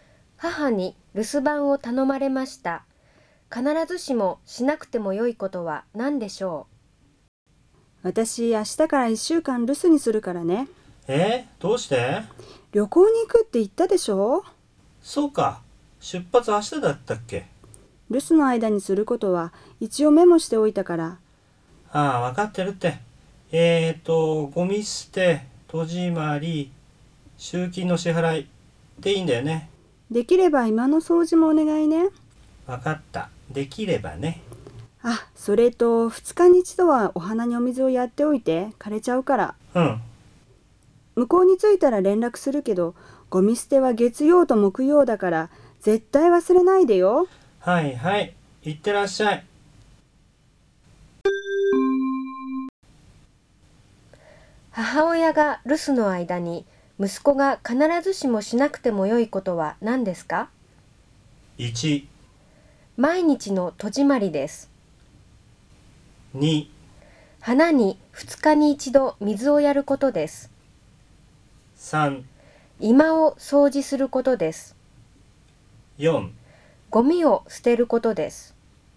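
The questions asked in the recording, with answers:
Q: 母親が留守の間に息子が必ずしもしなくてもよいことは何ですか?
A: 3: 居間を掃除することです。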